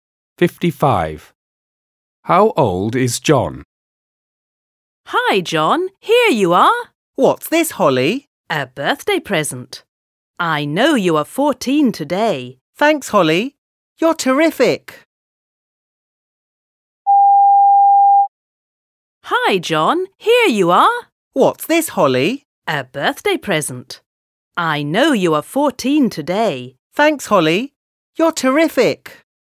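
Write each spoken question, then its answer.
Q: How old is John?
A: 14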